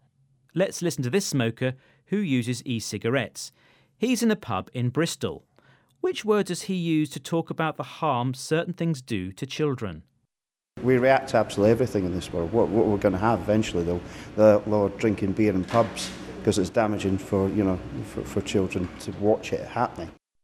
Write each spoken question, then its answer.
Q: Which word does he use to talk about the harm certain things do to children?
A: He uses the word damaging, meaning harmful.